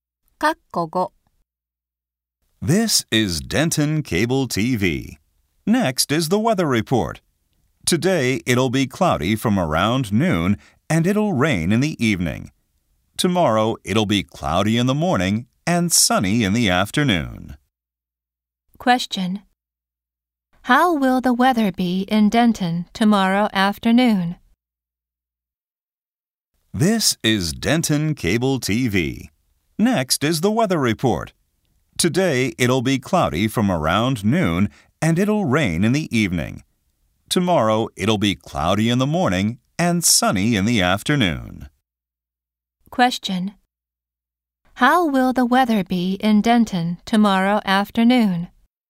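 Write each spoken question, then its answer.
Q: How will the weather be in Denton tomorrow afternoon?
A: Sunny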